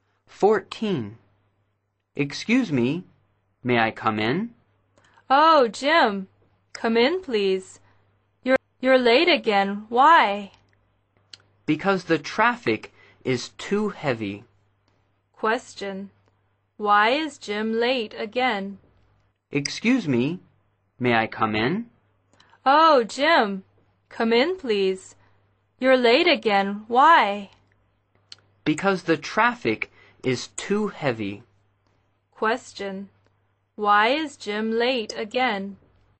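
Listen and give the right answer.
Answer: The traffic is too heavy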